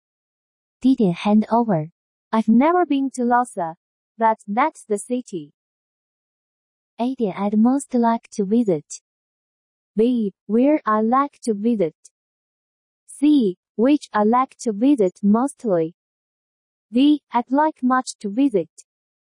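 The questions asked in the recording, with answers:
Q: I've never been to Lhasa, but that's the city.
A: A: I'd most like to visit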